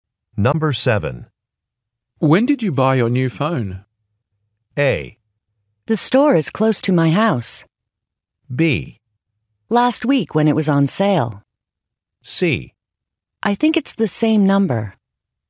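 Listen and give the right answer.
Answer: B: Last week when it was on sale.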